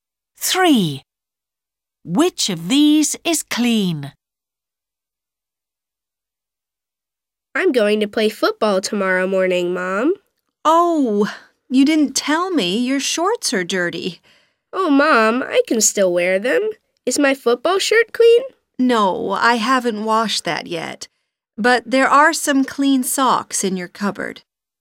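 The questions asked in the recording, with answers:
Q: Which of these is clean?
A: socks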